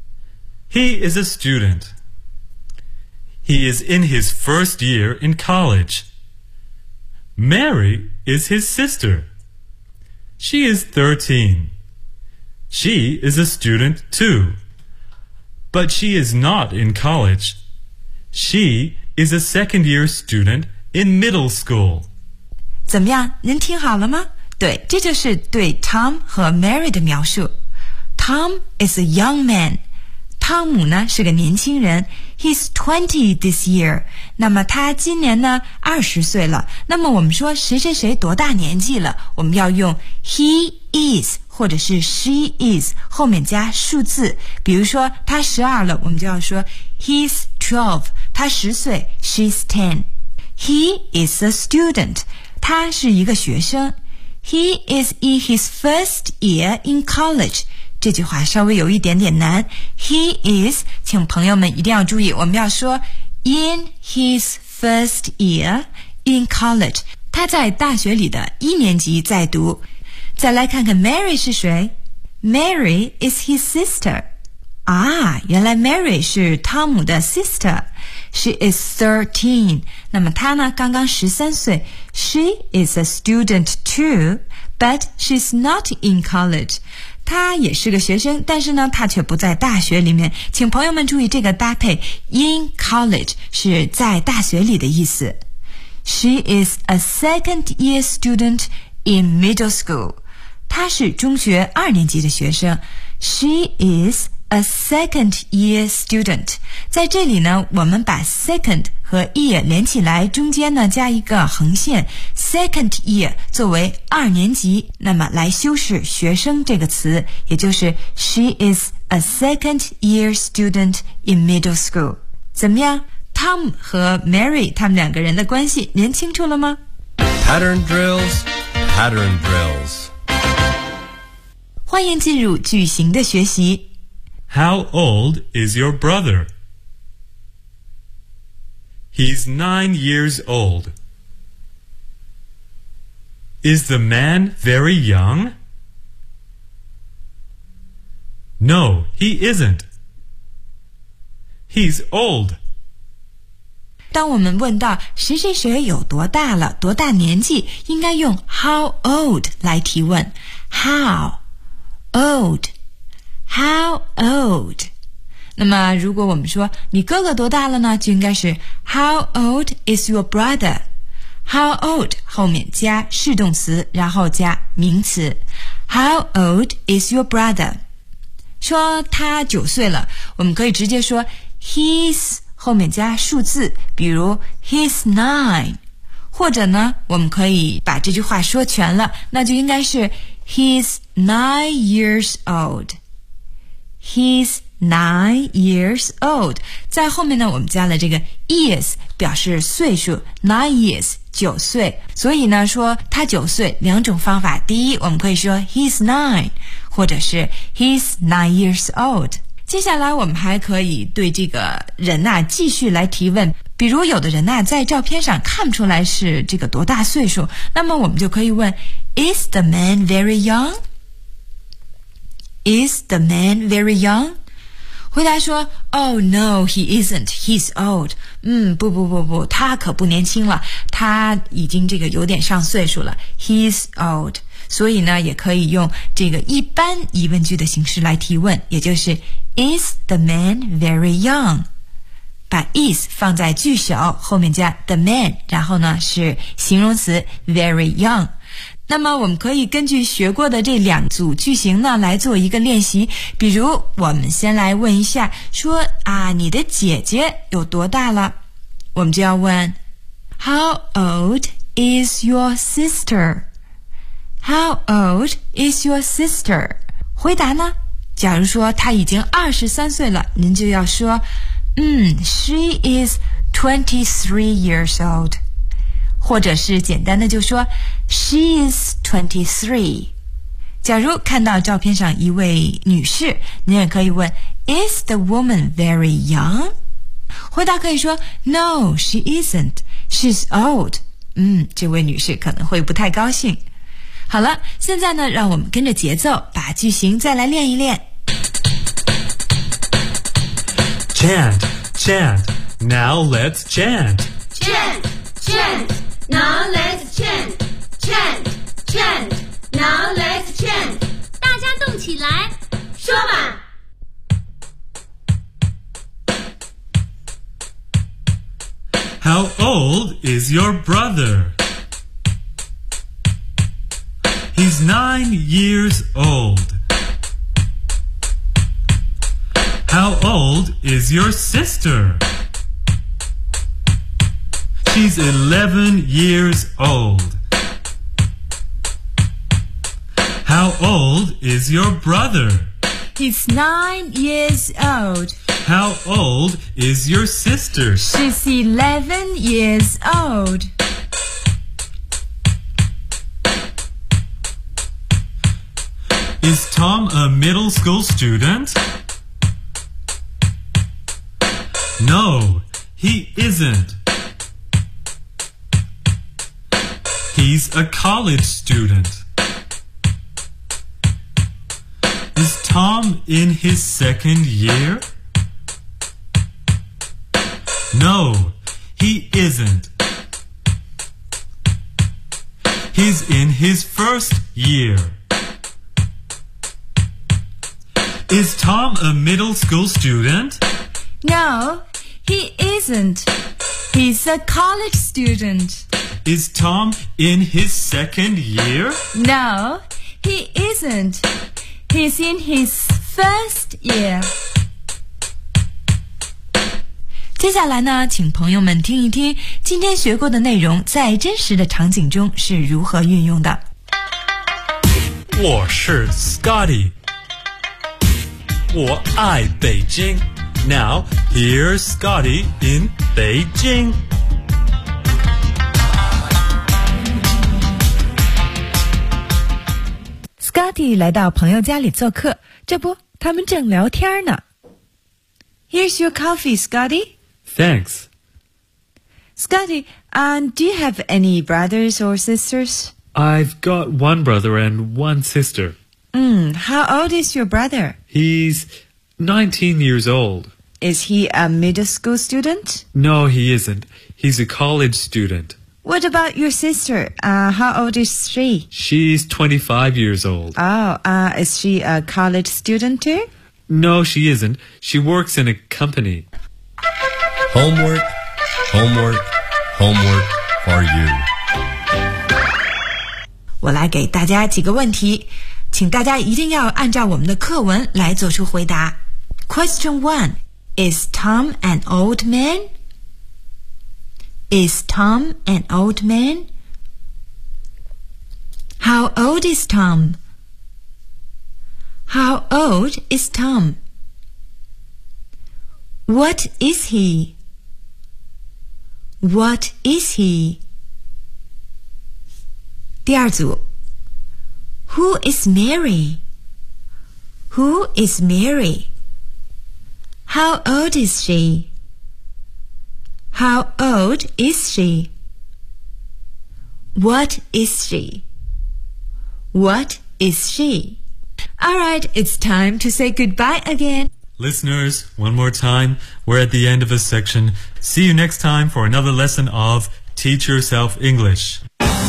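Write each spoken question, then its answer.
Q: Is Tom an old man?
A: No, he isn't. He is a young man.

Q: How old is Tom?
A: He is 20.

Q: What is he?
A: He is a student, in his first year in college.

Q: Who is Mary?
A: She is Tom's sister.

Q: How old is she?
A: She is 13.

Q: What is she?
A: She is a second year student in middle school.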